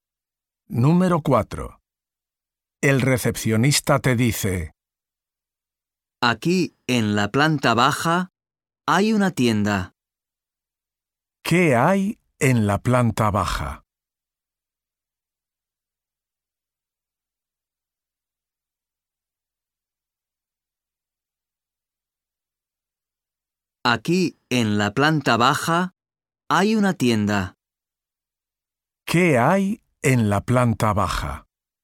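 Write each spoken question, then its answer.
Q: ¿Qué hay en la planta baja?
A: Una tienda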